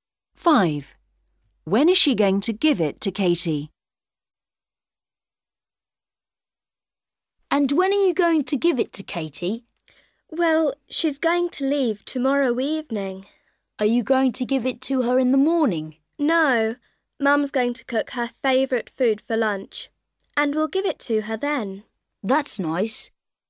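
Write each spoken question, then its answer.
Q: When is she going to give it to Katie?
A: at lunch tomorrow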